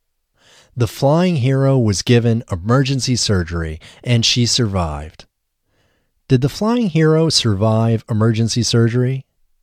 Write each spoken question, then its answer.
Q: Did the flying hero survive emergency surgery?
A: Yes, the flying hero survived emergency surgery.